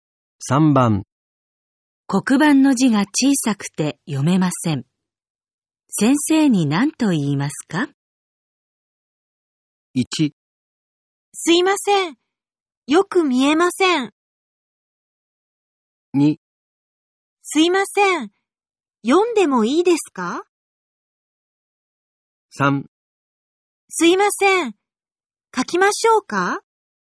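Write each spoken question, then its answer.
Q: 黒板の字が小さくて読めません。先生に何と言いますか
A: 1: すいません。よく見えません。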